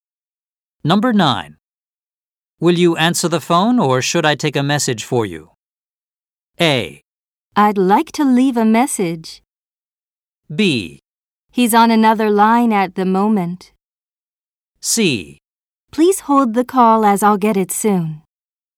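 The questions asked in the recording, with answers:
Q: Will you answer the phone or should I take a message for you?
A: C: Please hold the call as I'll get it soon.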